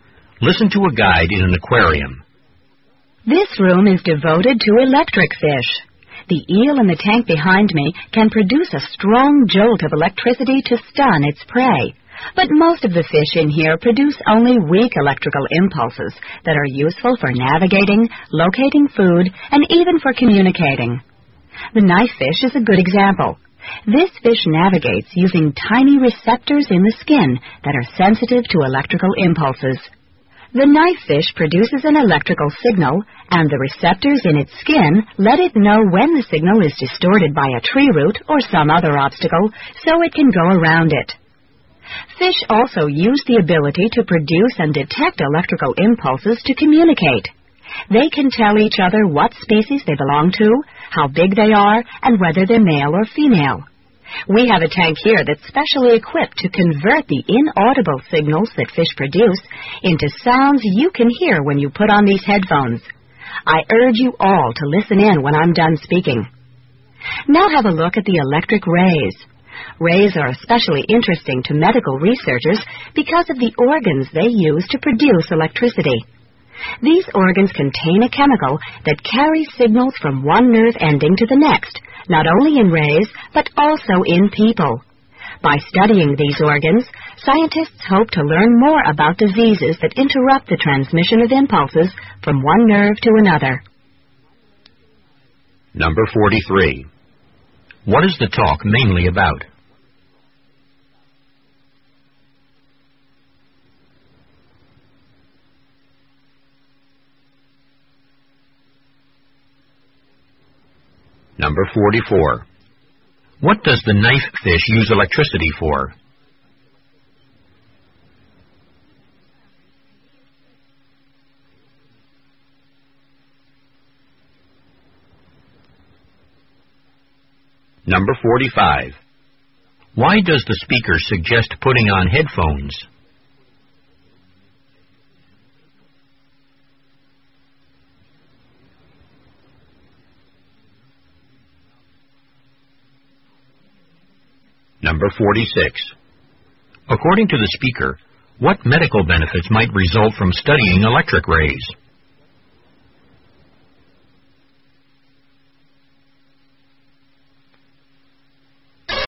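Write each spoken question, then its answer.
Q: What is the talk mainly about?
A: Electric fish and how they use electricity

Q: What does the knife fish use electricity for?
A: To navigate around obstacles

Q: Why does the speaker suggest putting on headphones?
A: To hear fish signals converted into sounds

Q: According to the speaker, what medical benefits might result from studying electric rays?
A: Learning more about diseases that interrupt nerve impulse transmission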